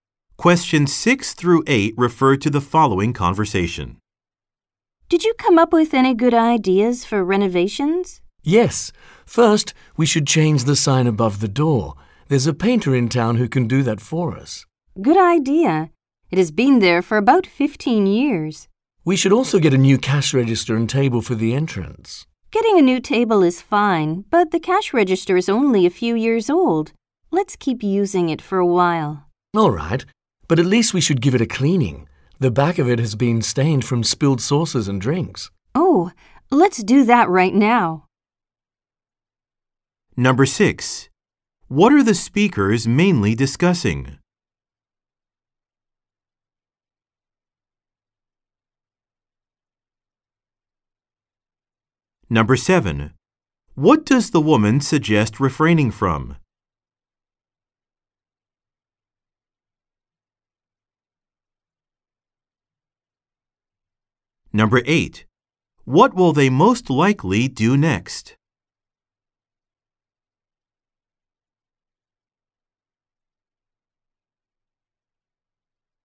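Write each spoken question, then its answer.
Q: What are the speakers mainly discussing?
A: Renovating their business

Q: What does the woman suggest refraining from?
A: Buying a new cash register

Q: What will they most likely do next?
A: Clean the cash register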